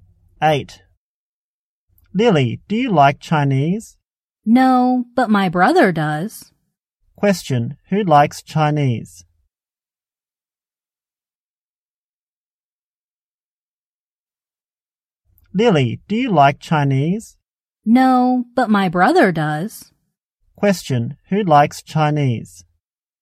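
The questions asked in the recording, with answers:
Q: Question, who likes Chinese?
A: Lily's brother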